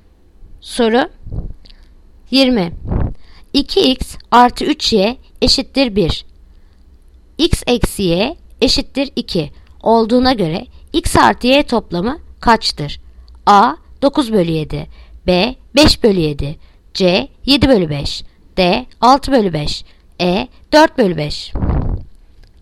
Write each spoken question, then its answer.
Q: 2x artı 3y eşittir 1 x eksi y eşittir 2 olduğuna göre x artı y toplamı kaçtır?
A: Yanıt Edirne 4 bölü 5